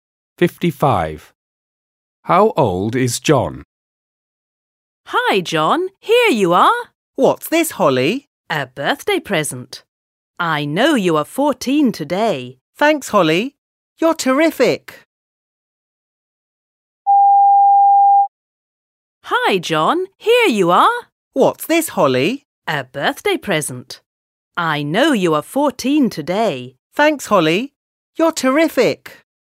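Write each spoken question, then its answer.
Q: How old is John?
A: 14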